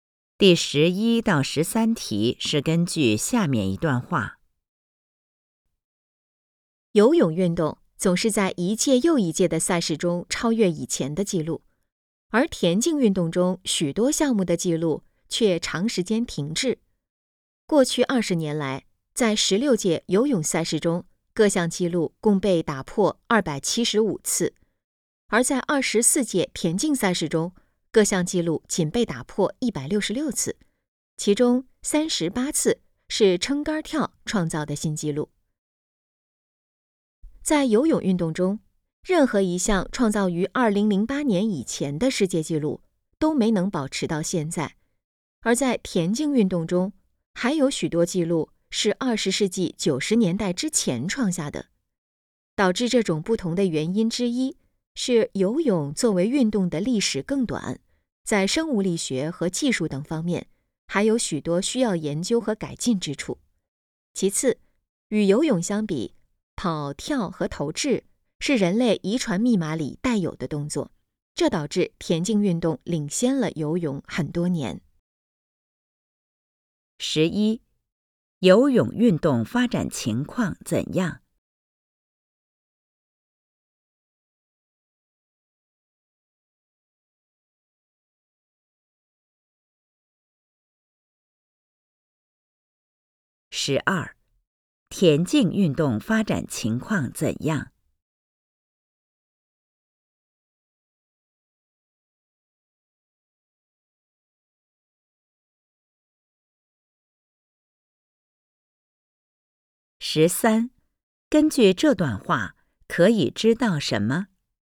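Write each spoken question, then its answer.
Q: 游泳运动发展情况怎样?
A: 记录不断被打破

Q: 田径运动发展情况怎样?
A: 许多项目的记录长时间停滞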